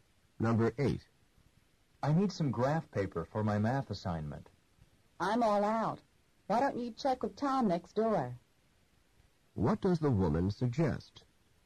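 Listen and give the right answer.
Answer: Asking Tom next door for graph paper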